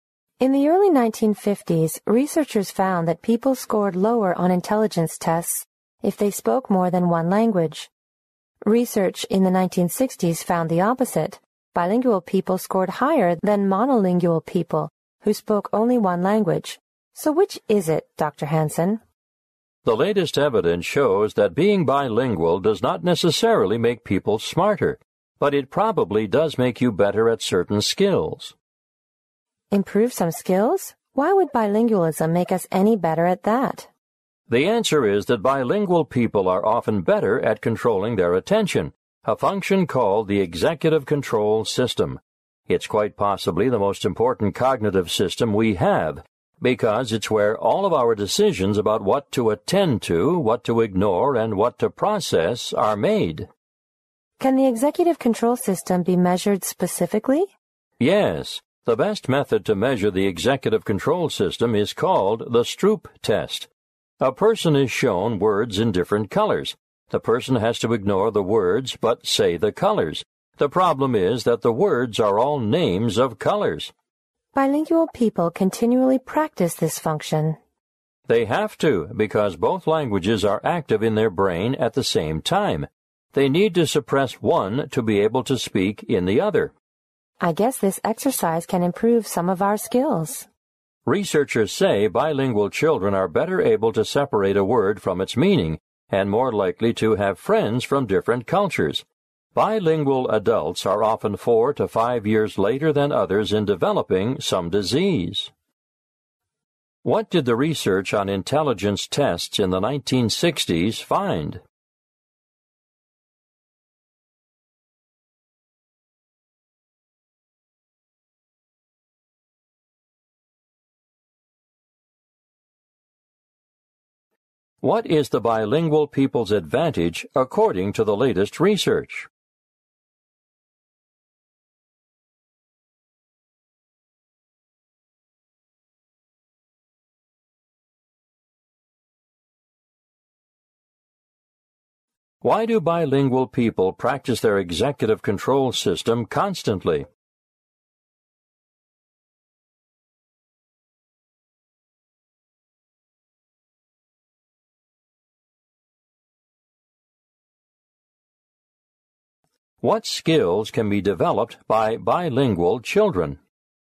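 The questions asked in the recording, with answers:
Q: What did the research on intelligence tests in the 1960s find?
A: Bilingual people scored higher than monolingual people.

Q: What is the bilingual people's advantage according to the latest research?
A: They are better at controlling their attention (executive control system).

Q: Why do bilingual people practice their executive control system constantly?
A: Both languages are active at the same time, so they must suppress one to speak the other.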